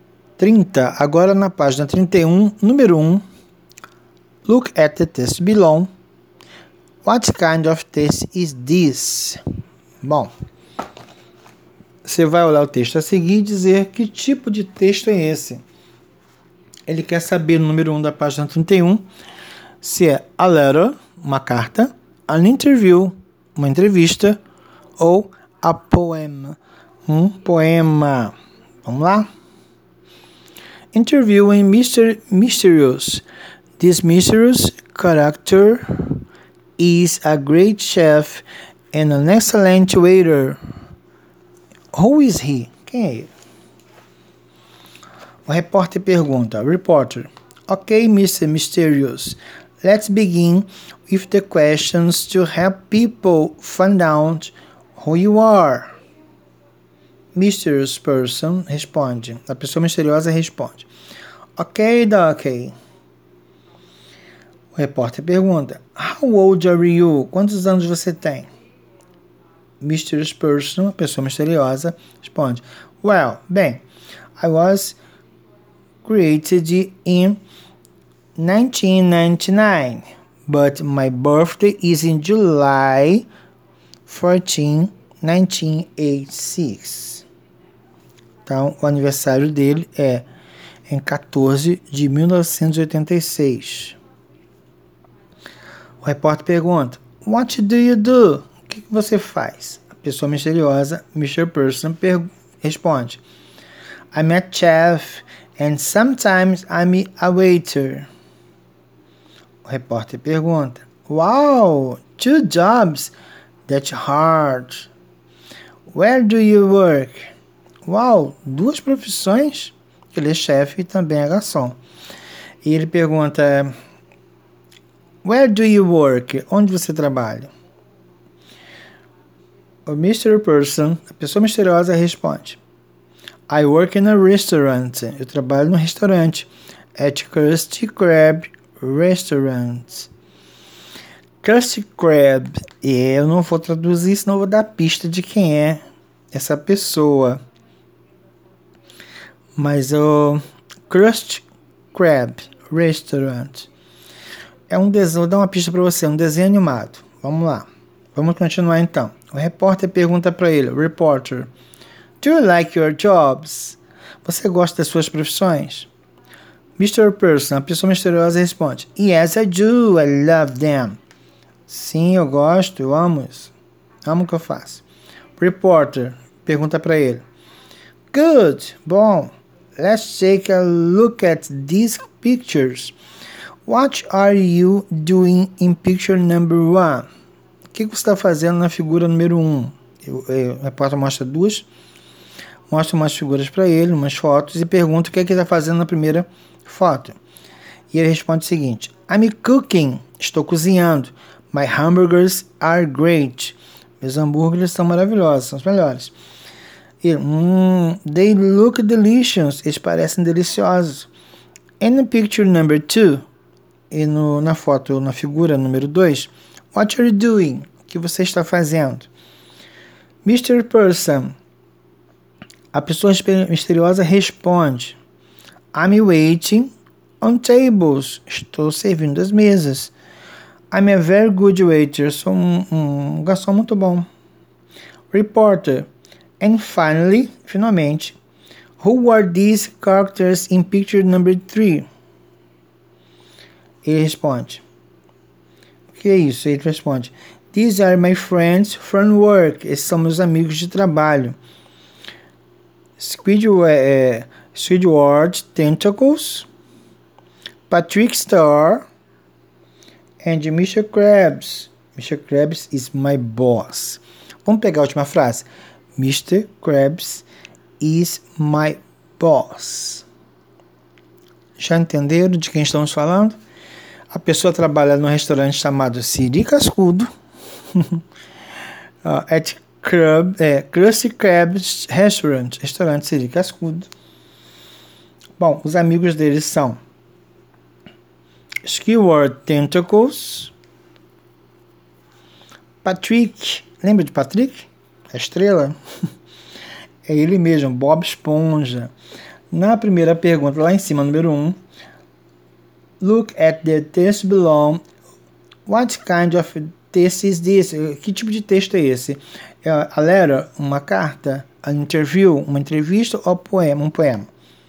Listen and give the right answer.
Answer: Correto. An interview é uma entrevista.